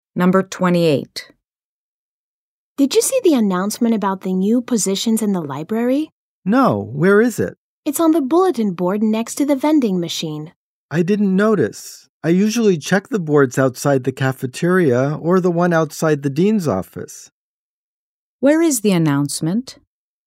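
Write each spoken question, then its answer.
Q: Where is the announcement?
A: On the bulletin board next to the vending machine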